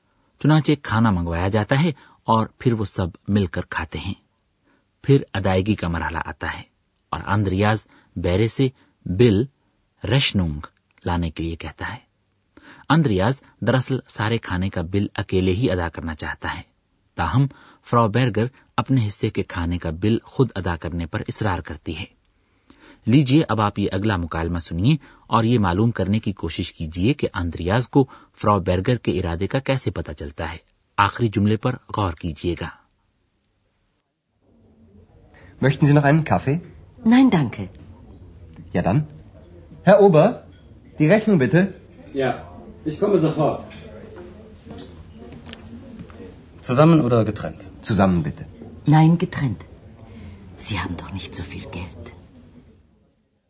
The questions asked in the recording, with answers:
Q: یہ معلوم کرنے کی کوشش کیجیے کہ اندریاز کو فرا Berger کے ارادے کا کیسے پتا چلتا ہے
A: وہ کہتی ہے نہیں الگ الگ